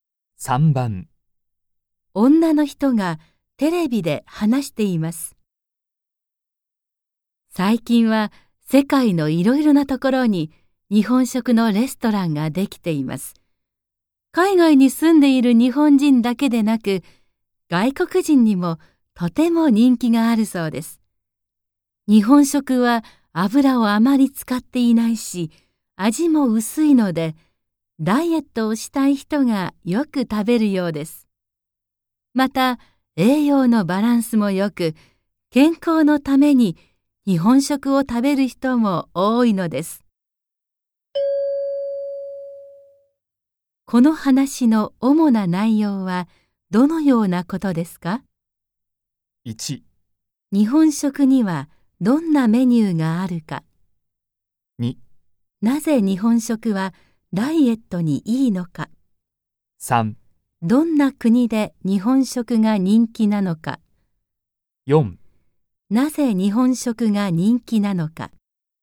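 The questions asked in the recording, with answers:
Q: この話の主な内容はどのようなことですか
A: 4: なぜ日本食が人気なのか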